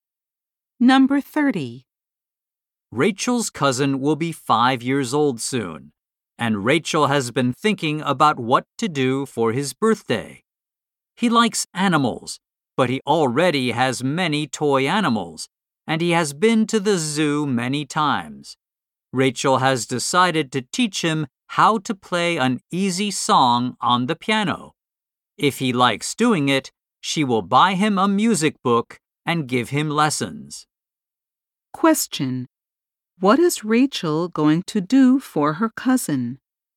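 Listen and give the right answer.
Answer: Teach him how to play an easy song on the piano.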